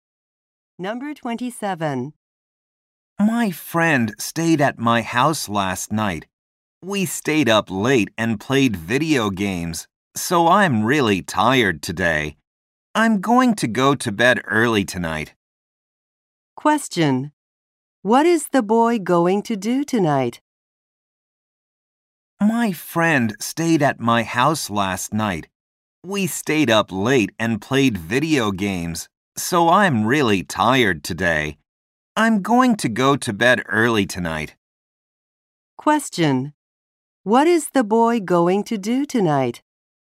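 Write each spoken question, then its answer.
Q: What is the boy going to do tonight?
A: Go to bed early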